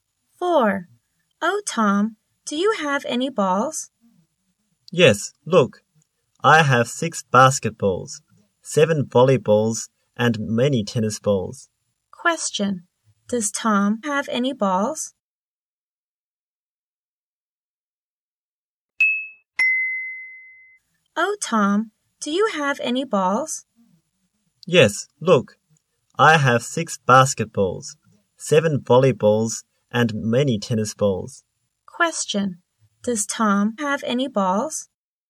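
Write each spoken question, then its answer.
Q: Does Tom have any balls?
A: Yes, he does.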